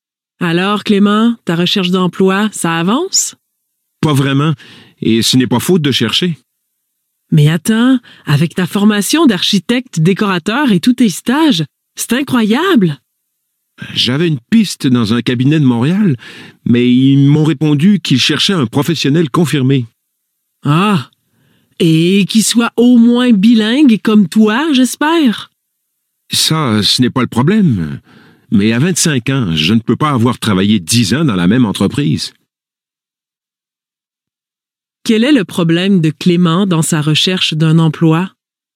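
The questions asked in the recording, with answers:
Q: Quel est le problème de Clément dans sa recherche d'un emploi?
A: Il manque d'expérience professionnelle (on cherche un professionnel confirmé).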